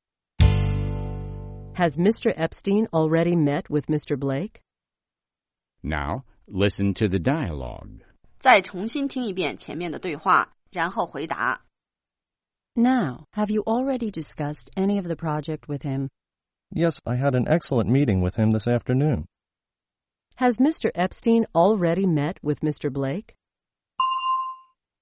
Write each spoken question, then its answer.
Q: Has Mr. Epstein already met with Mr. Blake?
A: Yes, they met earlier that afternoon.